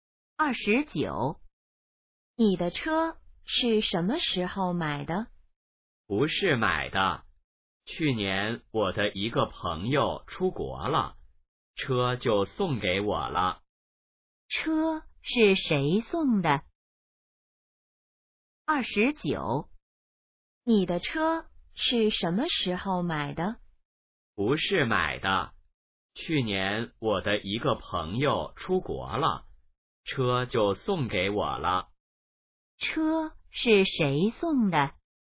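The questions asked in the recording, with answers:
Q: 车是谁送的?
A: 朋友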